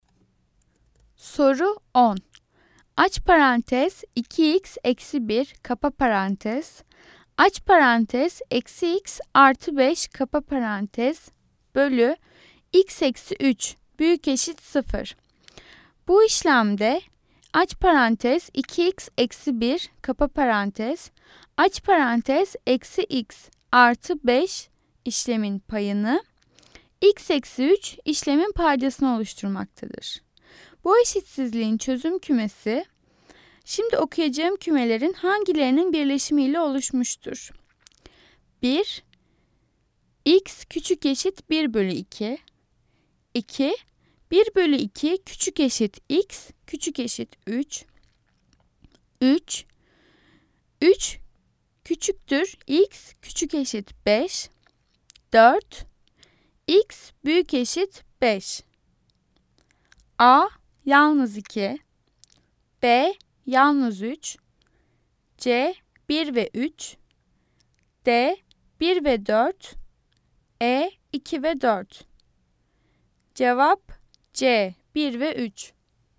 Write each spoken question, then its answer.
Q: Bu eşitsizliğin çözüm kümesi, şimdi okuyacağım kümelerin hangilerinin birleşimiyle oluşmuştur?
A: Cevap C, 1 ve 3.